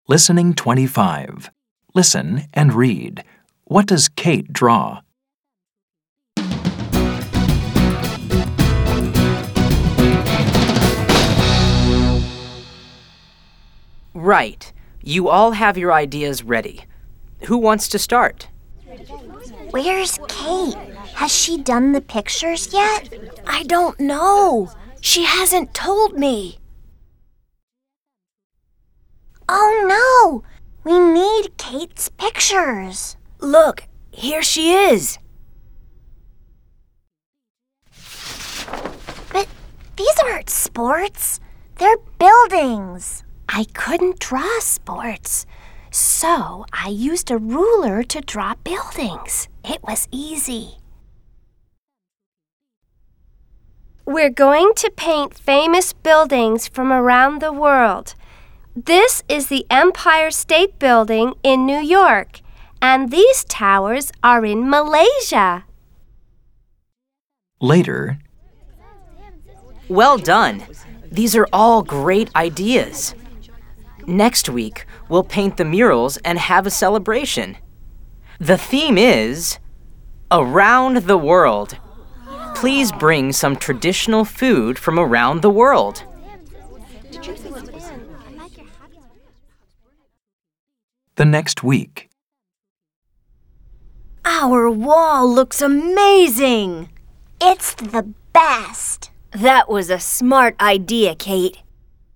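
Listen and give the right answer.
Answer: Buildings (famous buildings from around the world)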